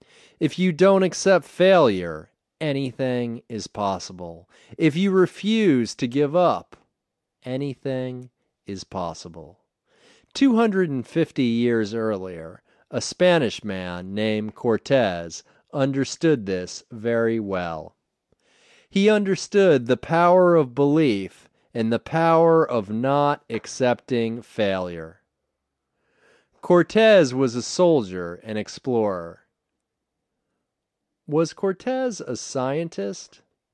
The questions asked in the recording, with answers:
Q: Was Cortez a scientist?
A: No, he wasn't a scientist.